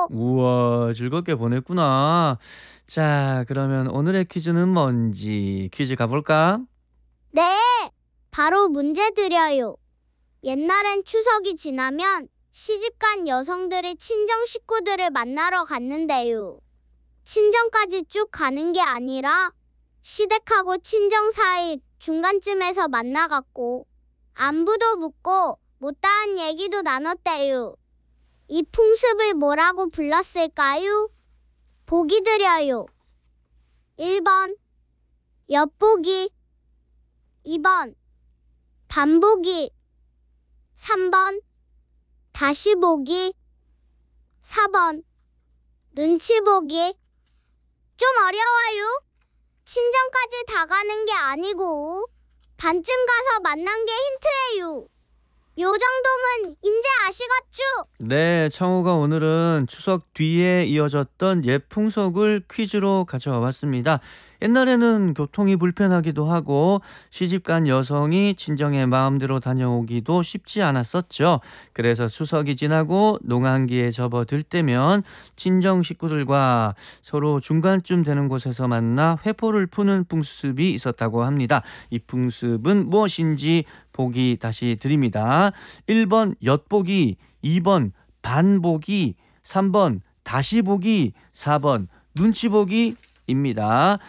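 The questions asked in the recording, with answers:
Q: 이 풍습은 무엇인지 보기 다시 드립니다. 1번 엿보기, 2번 반보기, 3번 다시보기, 4번 눈치보기 입니다.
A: 2번: 반보기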